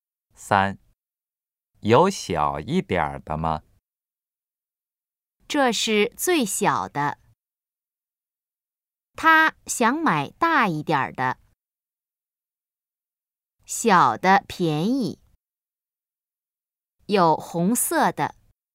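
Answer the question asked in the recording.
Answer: 这是最小的。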